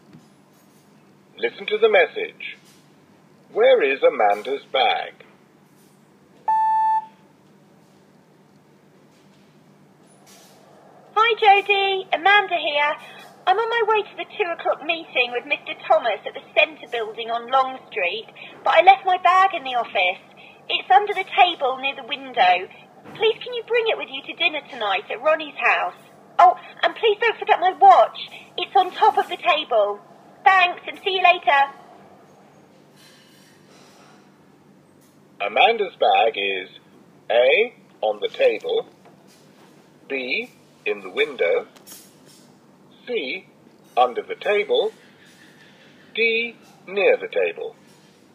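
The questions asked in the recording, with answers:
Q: Where is Amanda's bag?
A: C: under the table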